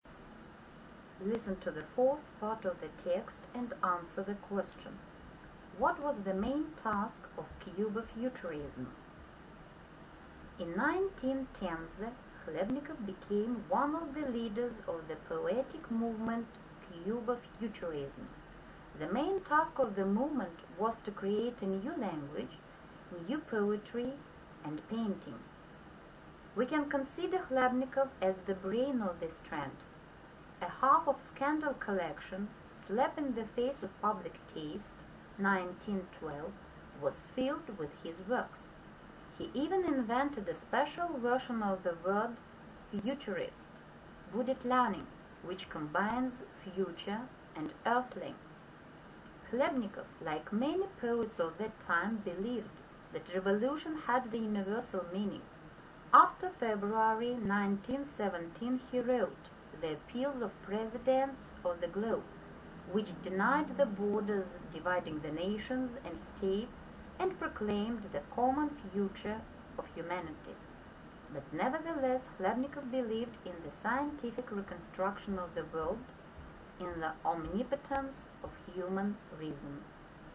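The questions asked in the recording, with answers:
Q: What was the main task of Cuba futurism?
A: To create a new language, new poetry and painting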